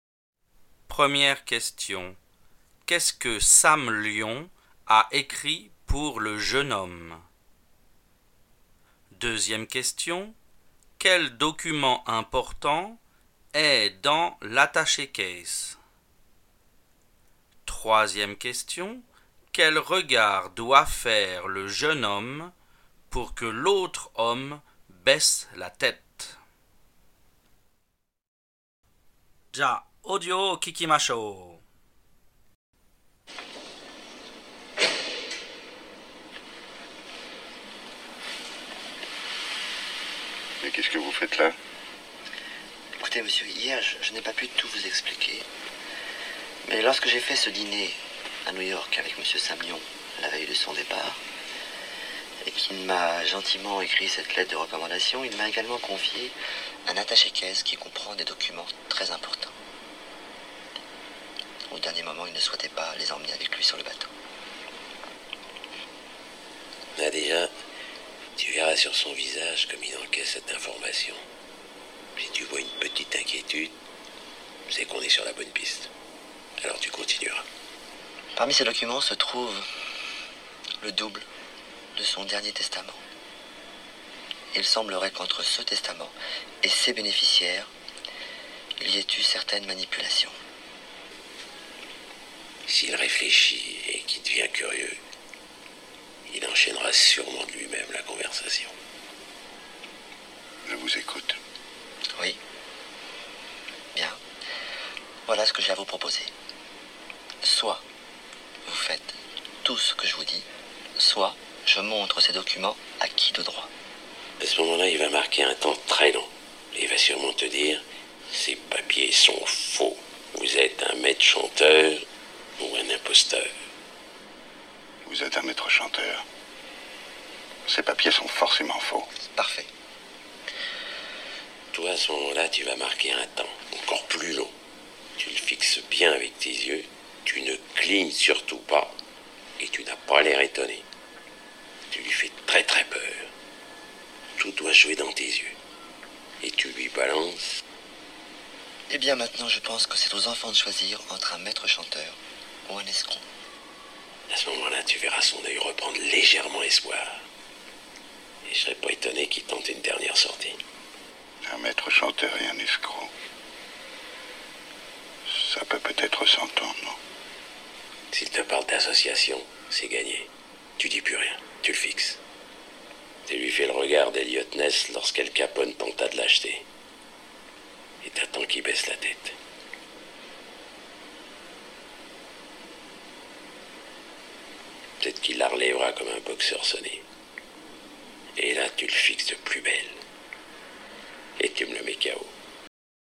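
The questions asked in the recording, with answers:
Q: Qu'est-ce que Sam Lyon a écrit pour le jeune homme?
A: Une lettre de recommandation

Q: Quel document important est dans l'attaché case?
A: Le double de son dernier testament

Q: quel regard doit faire le jeune homme pour que l'autre homme baisse la tête?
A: Le regard d'Eliot Ness lorsqu'Al Capone tenta de l'acheter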